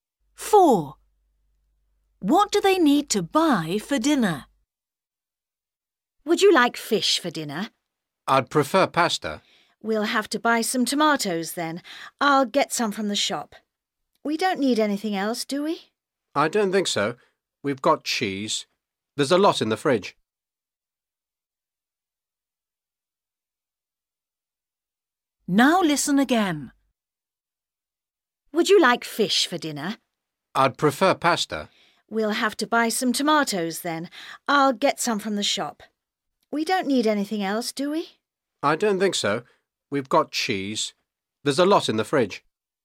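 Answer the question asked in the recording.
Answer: tomatoes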